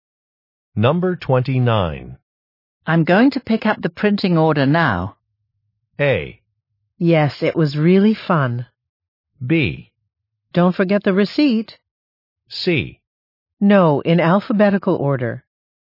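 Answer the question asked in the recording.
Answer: B: Don't forget the receipt.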